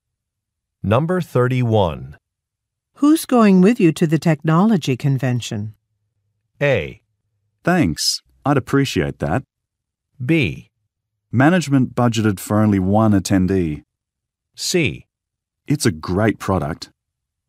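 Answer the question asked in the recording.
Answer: B: Management budgeted for only one attendee.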